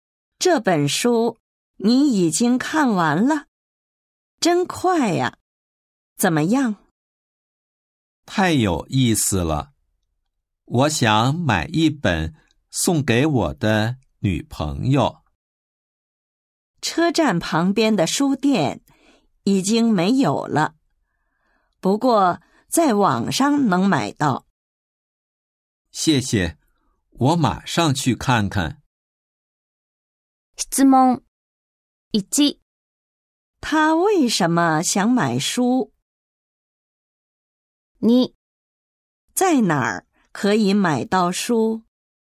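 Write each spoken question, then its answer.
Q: 他为什么想买书?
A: 想送给女朋友(书太有意思了)

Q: 在哪儿可以买到书?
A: 在网上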